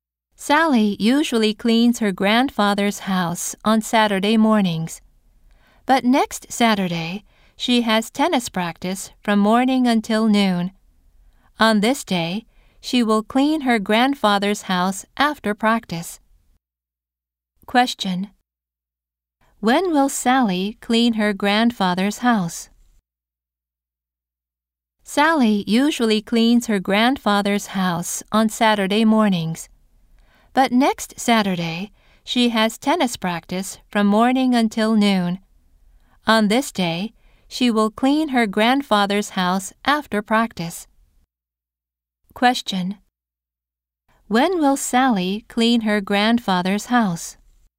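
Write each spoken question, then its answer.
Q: When will Sally clean her grandfather's house?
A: Next Saturday afternoon, after tennis practice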